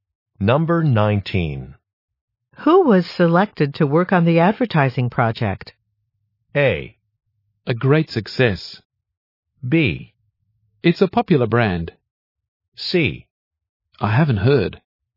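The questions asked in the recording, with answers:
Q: Who was selected to work on the advertising project?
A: C: I haven't heard.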